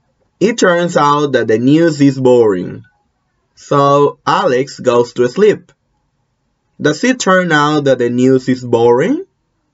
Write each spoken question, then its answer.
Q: Does it turn out that the news is boring?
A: Yes, it turns out that the news is boring.